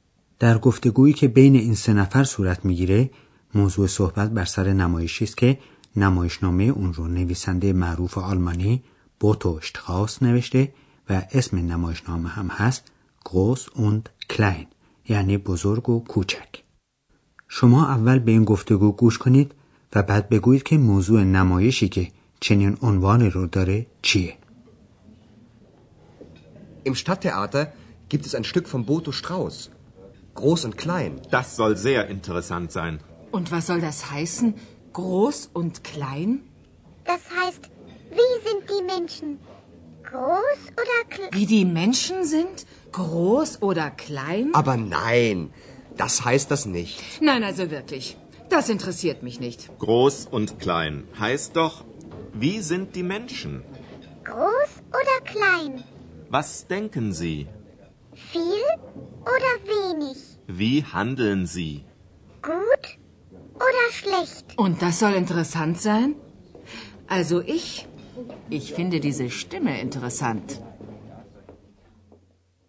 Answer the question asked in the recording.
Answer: در اینجا منظور از بزرگ و کوچک اخلاق انسانها، یعنی چگونگی روحیات و طرز فکر و رفتار انسانهاست.